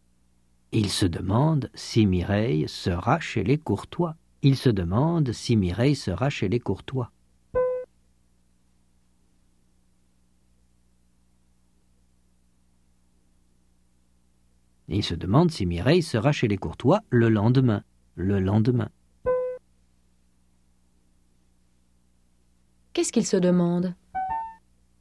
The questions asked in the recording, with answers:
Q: Qu'est-ce qu'il se demande ?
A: Si Mireille sera chez les Courtois le lendemain.